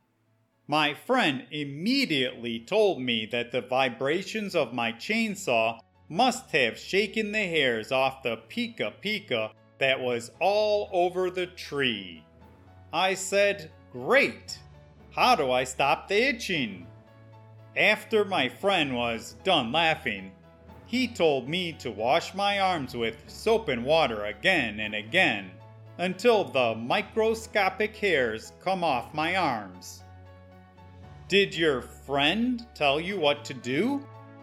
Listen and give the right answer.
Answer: Yes. After he could stop laughing enough to speak, he told me that I needed to wash all the little pica pica hairs off of me.